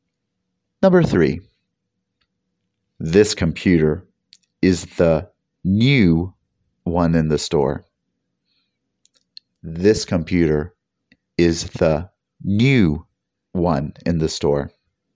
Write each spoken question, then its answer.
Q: This computer is the new one in the store.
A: Did you guess newest? Excellent.